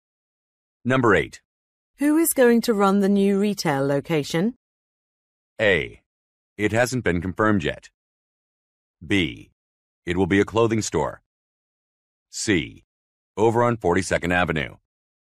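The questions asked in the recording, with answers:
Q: Who is going to run the new retail location?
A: A: It hasn't been confirmed yet.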